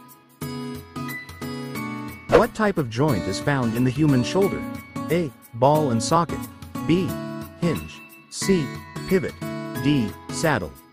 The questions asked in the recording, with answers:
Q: What type of joint is found in the human shoulder?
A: The answer is A. Ball and socket.